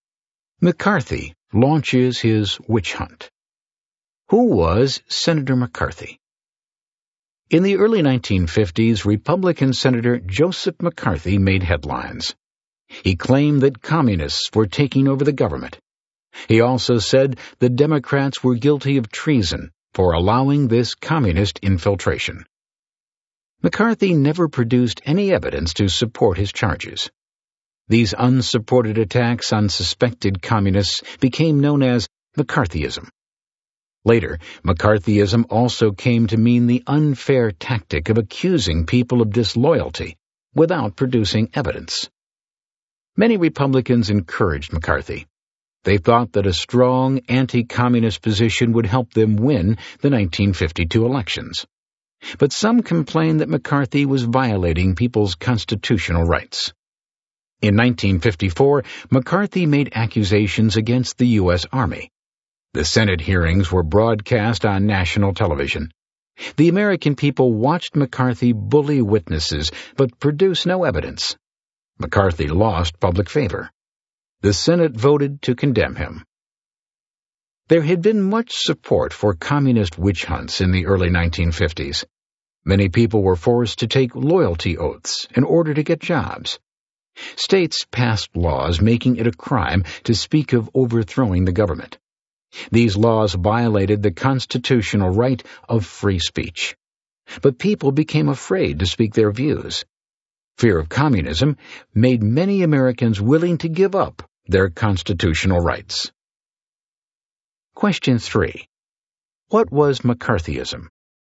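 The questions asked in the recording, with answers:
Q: What was McCarthyism?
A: Senator McCarthy's unsupported attacks on suspected communists; accusing people of disloyalty without evidence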